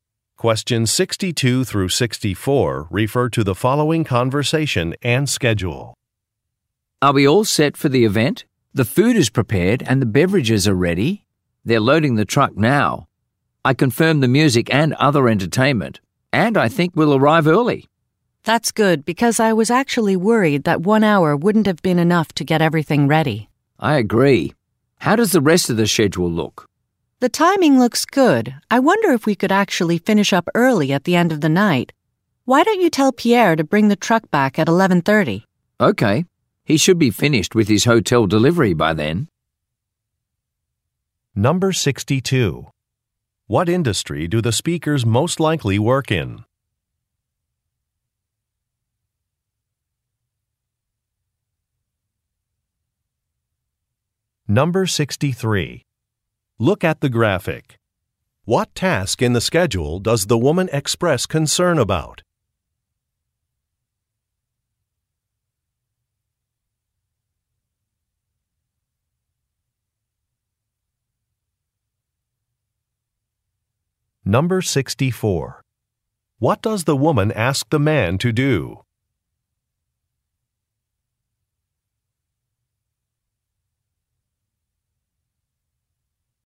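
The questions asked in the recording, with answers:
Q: What industry do the speakers most likely work in?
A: Catering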